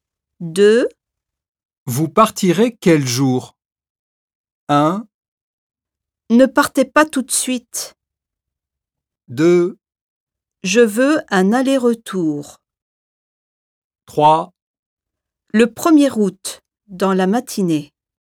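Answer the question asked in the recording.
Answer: 3: Le 1er août, dans la matinée.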